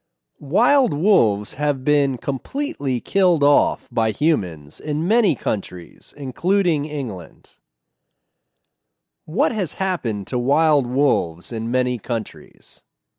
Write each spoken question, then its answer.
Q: What has happened to wild wolves in many countries?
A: They have been completely killed off in many countries.